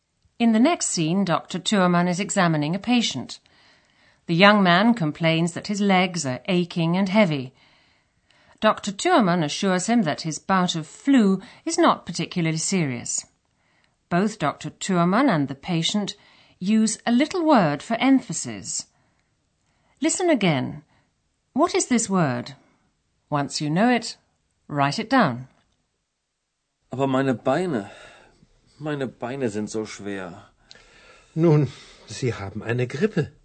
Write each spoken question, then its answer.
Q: What is this word?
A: the little word used in German for emphasis is so.